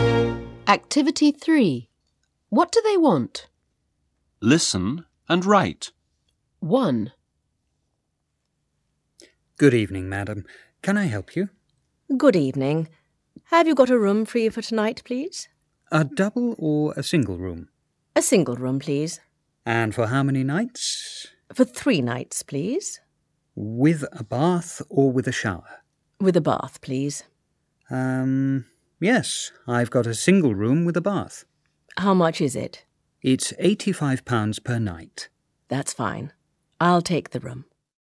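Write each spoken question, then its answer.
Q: What do they want?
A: A single room with a bath for 3 nights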